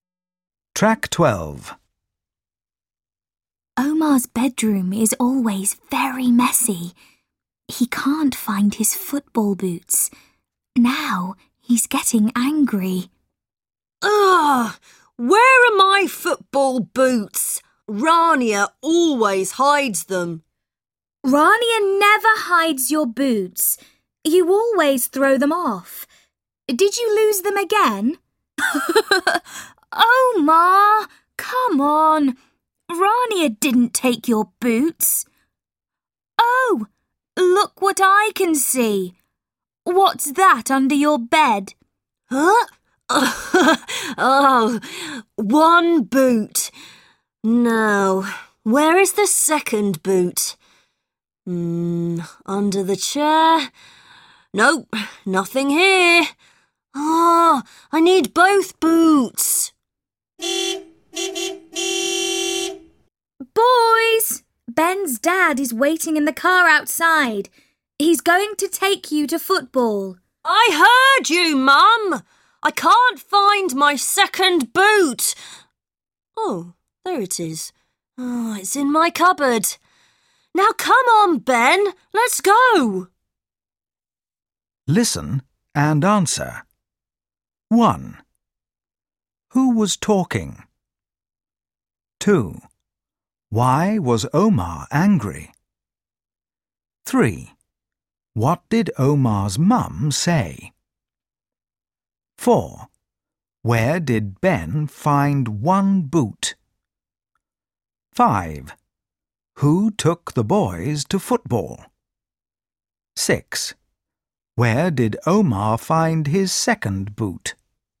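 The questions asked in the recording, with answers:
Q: Why was Omar angry?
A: He couldn't find his football boots

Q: Where did Ben find one boot?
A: Under Omar's bed

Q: Who took the boys to football?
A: Ben's dad

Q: Where did Omar find his second boot?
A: In his cupboard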